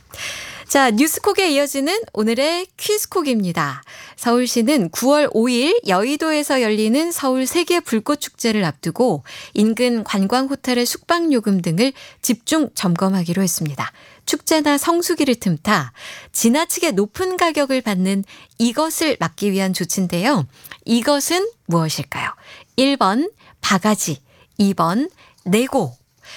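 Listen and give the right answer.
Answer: 1번: 바가지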